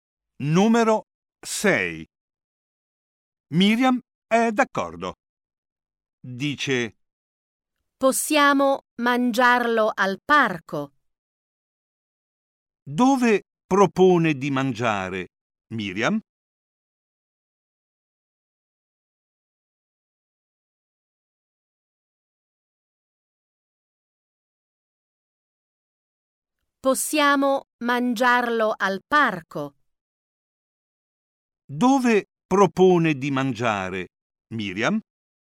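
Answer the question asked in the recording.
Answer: Al parco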